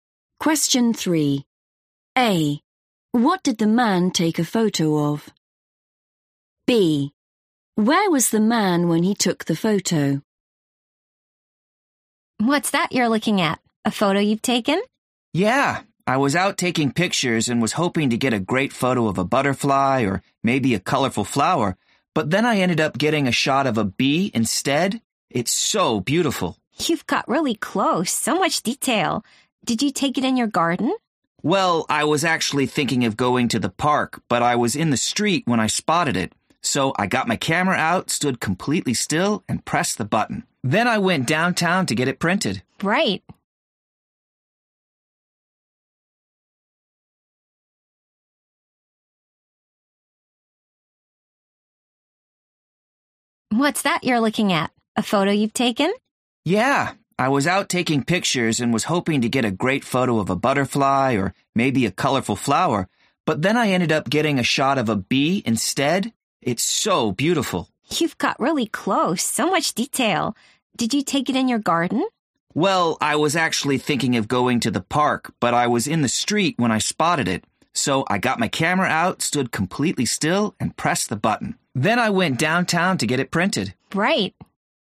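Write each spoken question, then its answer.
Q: What did the man take a photo of?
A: a bee

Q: Where was the man when he took the photo?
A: in the street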